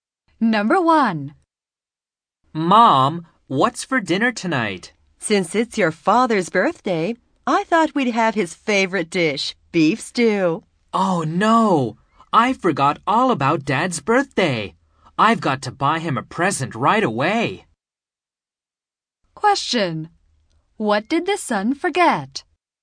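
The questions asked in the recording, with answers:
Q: What did the son forget?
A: His father's birthday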